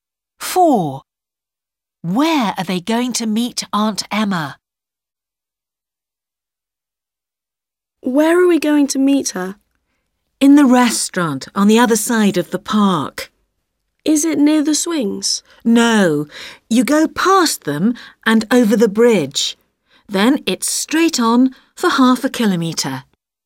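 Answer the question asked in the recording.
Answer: in the restaurant on the other side of the park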